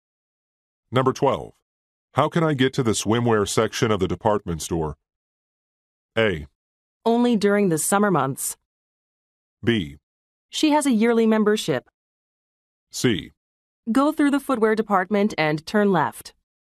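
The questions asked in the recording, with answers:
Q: How can I get to the swimwear section of the department store?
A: C: Go through the footwear department and turn left.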